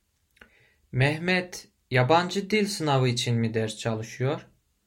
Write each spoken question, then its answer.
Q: Mehmet yabancı dil sınavı için mi ders çalışıyor?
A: Hayır. Mehmet üniversite sınavı için ders çalışıyor.